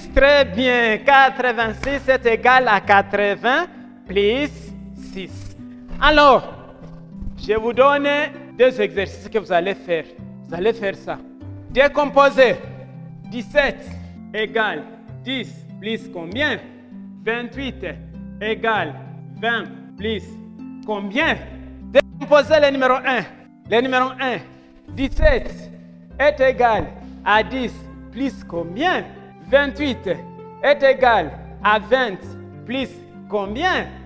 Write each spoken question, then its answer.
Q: Le numéro 1, 17 est égal à 10 plus combien?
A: 17 est égal à 10 plus 7.

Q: 28 est égal à 20 plus combien?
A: Est égal à 20 plus 8.